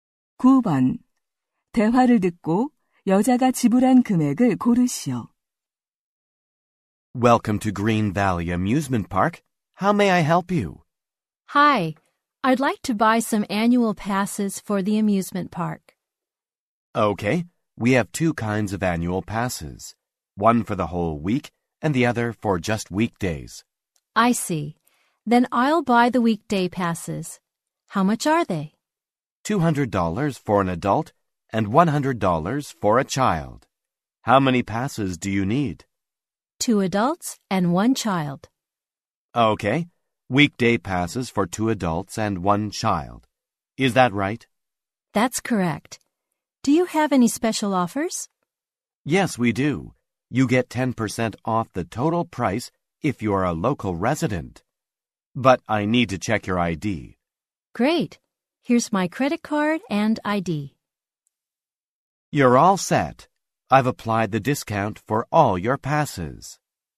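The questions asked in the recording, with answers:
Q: 대화를 듣고 여자가 지불한 금액을 고르시오.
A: $450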